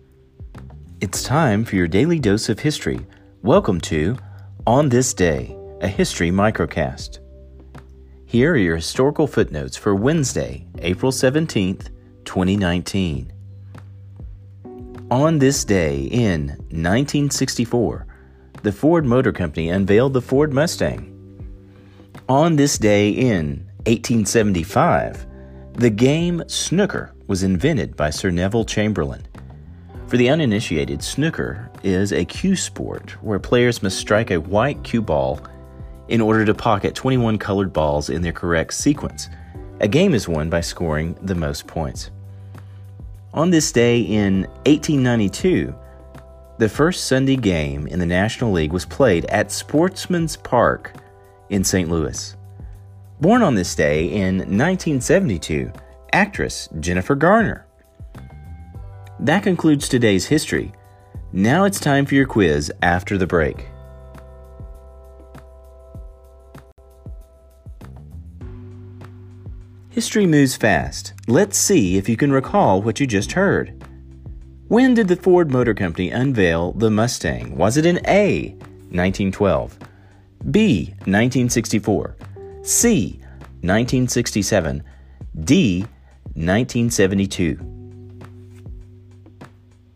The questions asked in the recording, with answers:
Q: When did the Ford Motor Company unveil the Mustang? Was it in A, 1912, B, 1964, C, 1967, D, 1972?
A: The answer, B, 1964.